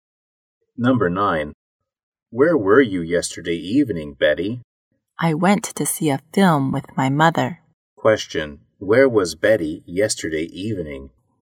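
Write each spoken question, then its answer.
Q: Question, where was Betty yesterday evening?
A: At the cinema, seeing a film with her mother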